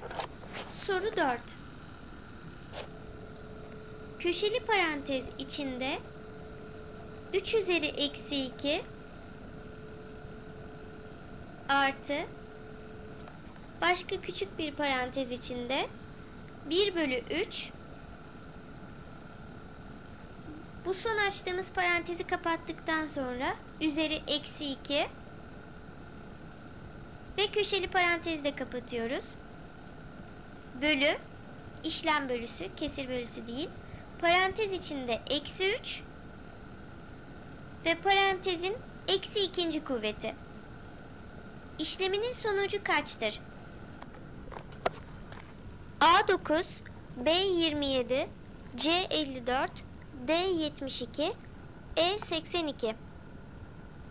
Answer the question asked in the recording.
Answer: Doğru cevap E82.